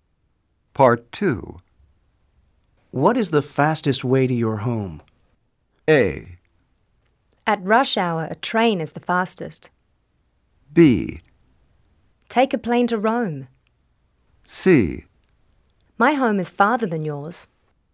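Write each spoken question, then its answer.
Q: What is the fastest way to your home?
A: A: At rush hour, a train is the fastest.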